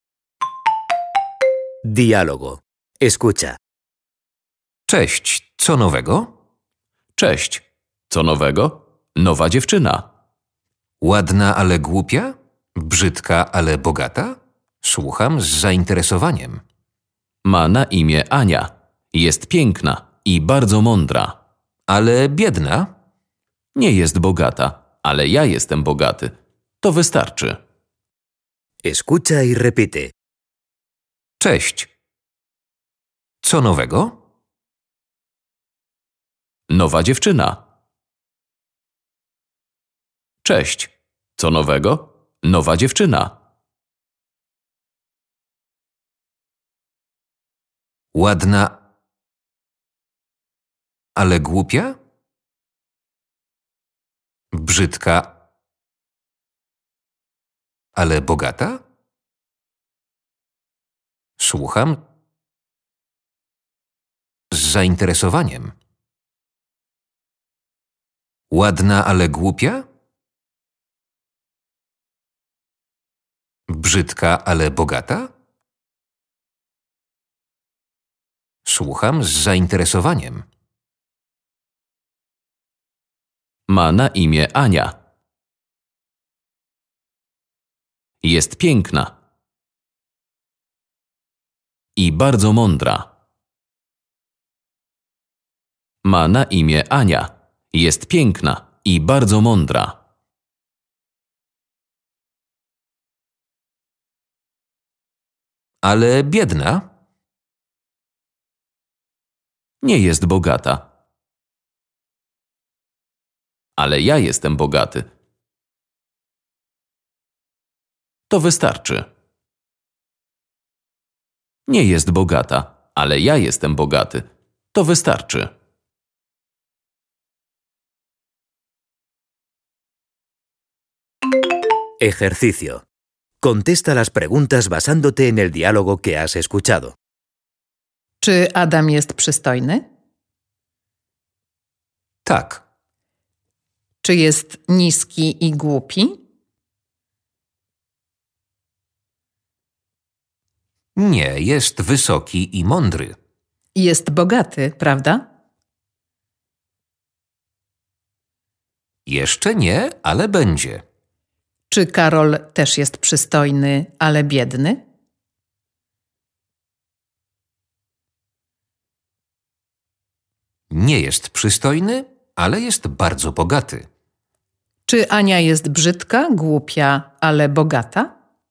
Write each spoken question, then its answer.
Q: Czy Ania jest brzydka, głupia, ale bogata?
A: Nie jest bogata, ale jest piękna i mądra.